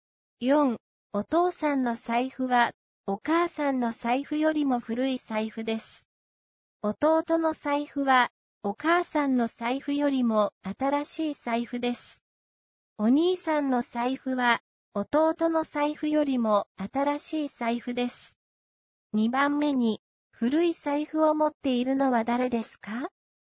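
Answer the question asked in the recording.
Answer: お母さん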